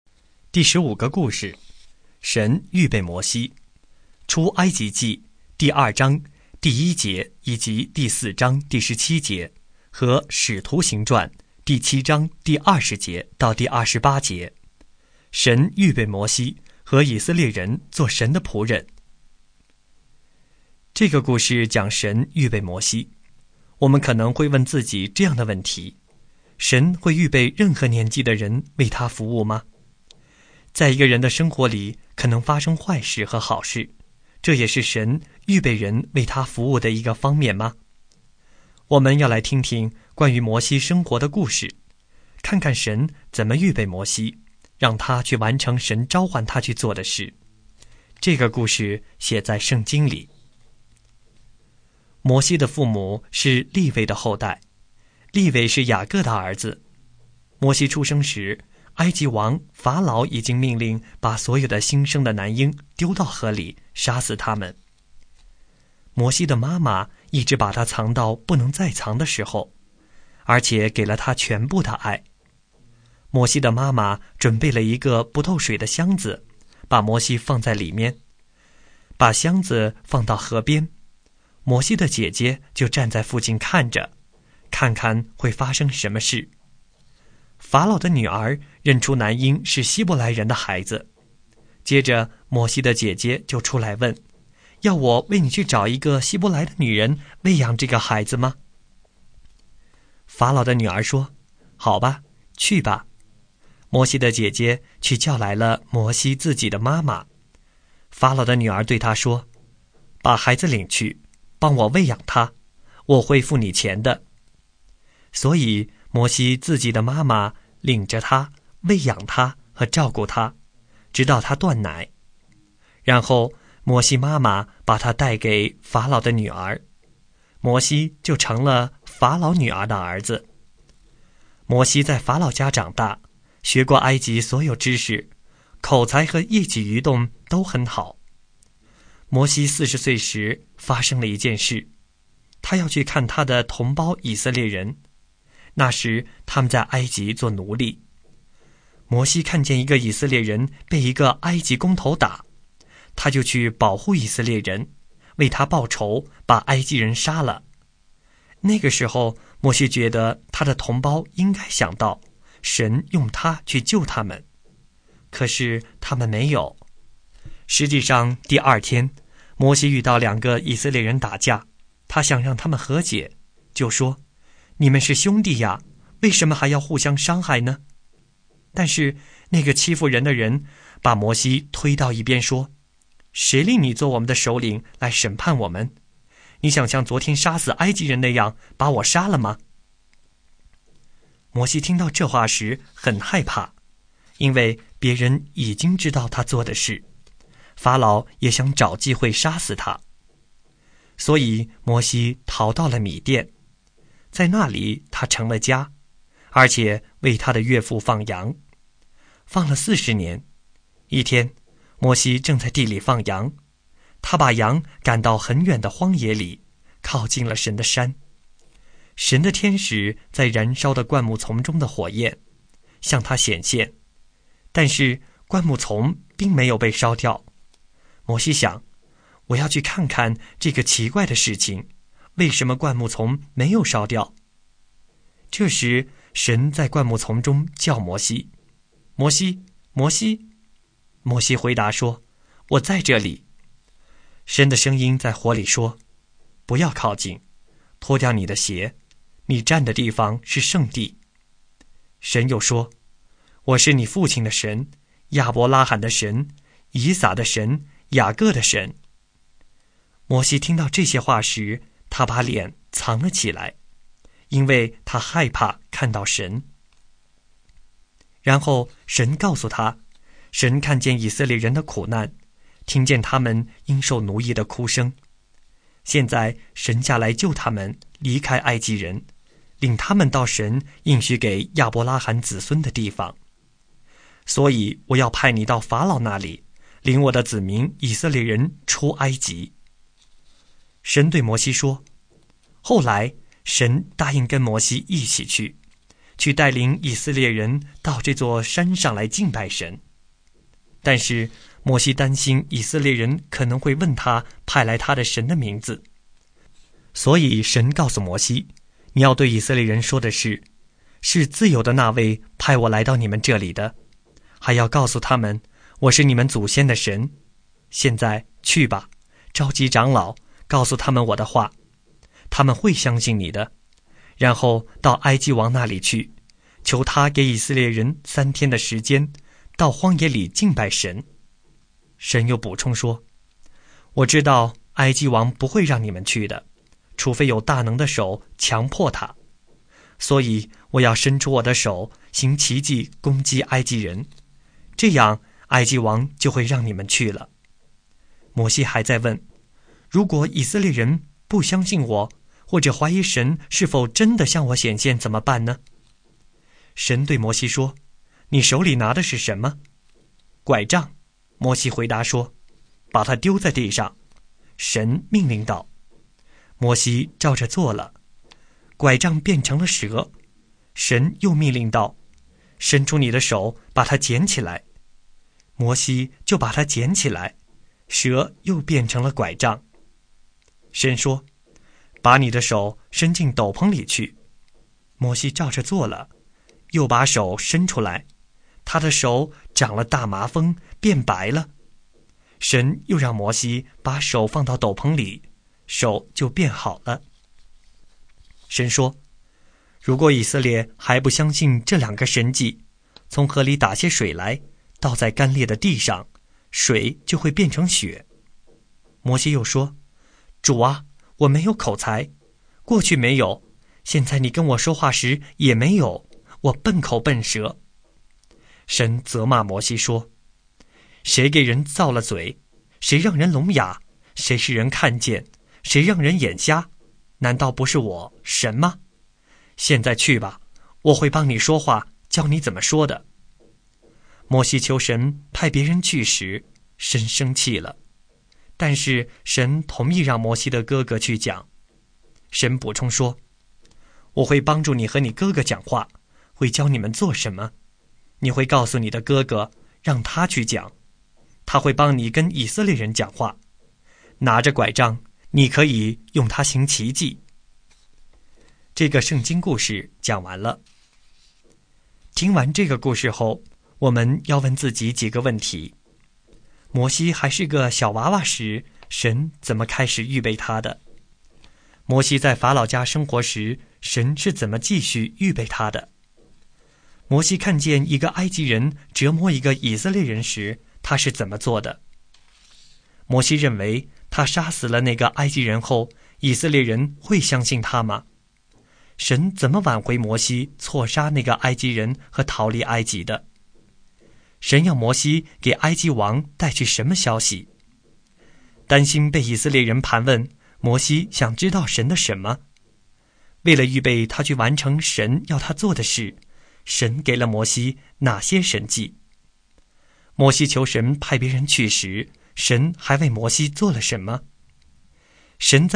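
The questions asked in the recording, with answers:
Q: 摩西看见一个埃及人折磨一个以色列人时,他是怎么做的?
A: 他去保护以色列人,为他报仇,把埃及人杀了

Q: 摩西认为他杀死了那个埃及人后,以色列人会相信他吗?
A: 他认为同胞会想到神用他去救他们,可是他们没有

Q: 神要摩西给埃及王带去什么消息?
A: 求他给以色列人3天时间到荒野里敬拜神

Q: 担心被以色列人盘问,摩西想知道神的什么?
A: 神的名字

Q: 为了预备他去完成神要他做的事,神给了摩西哪些神迹?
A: 拐杖变蛇,手长大麻风又变好,河水倒在地上变成血

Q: 摩西求神派别人去时,神还为摩西做了什么?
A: 神同意让摩西的哥哥去讲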